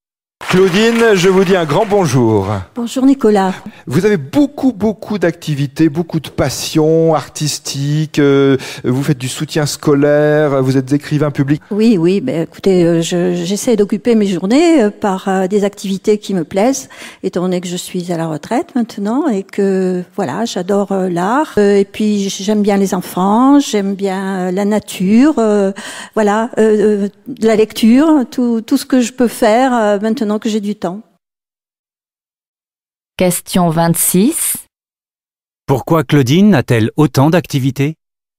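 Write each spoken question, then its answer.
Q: Pourquoi Claudine a-t-elle autant d'activités ?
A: Parce qu'elle est à la retraite et a du temps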